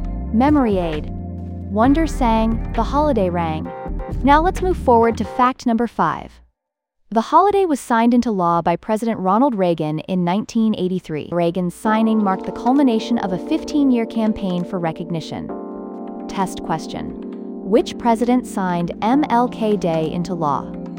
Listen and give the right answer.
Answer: Correct answer. Ronald Reagan.